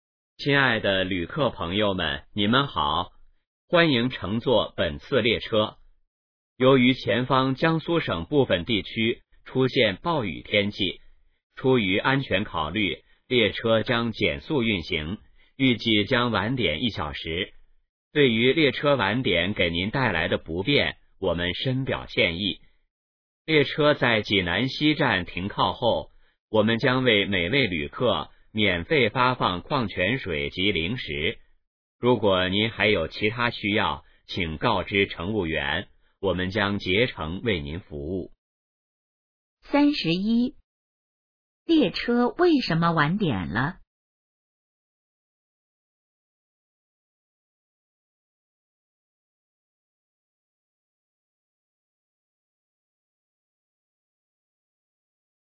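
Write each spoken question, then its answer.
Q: 列车为什么晚点了?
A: 前方部分地区出现暴雨,列车减速运行

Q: 列车停靠济南西站后会做什么?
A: 免费发放矿泉水及零食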